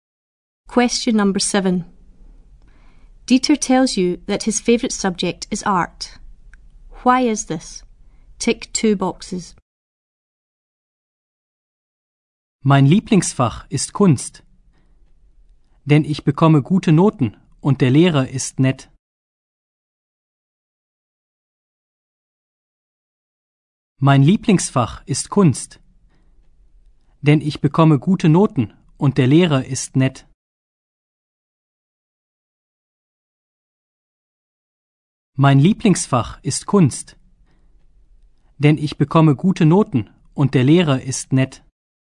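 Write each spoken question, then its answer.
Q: Why is this?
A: He gets good marks and the teacher is nice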